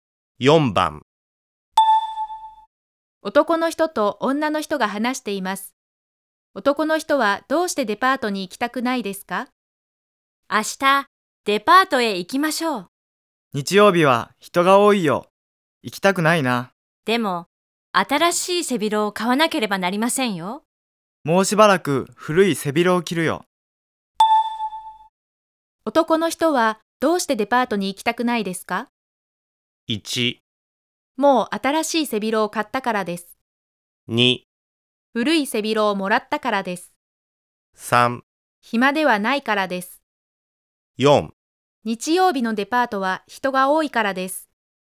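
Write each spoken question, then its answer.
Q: 男の人はどうしてデパートに行きたくないですか?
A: 4: 日曜日のデパートは人が多いからです。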